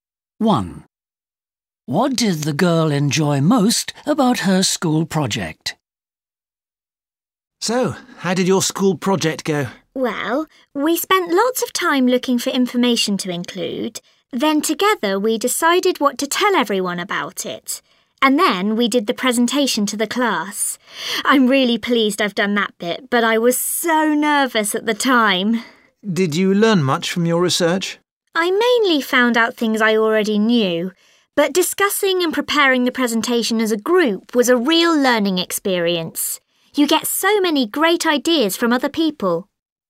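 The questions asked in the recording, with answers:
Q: What did the girl enjoy most about her school project?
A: Working with her group, discussing and preparing the presentation together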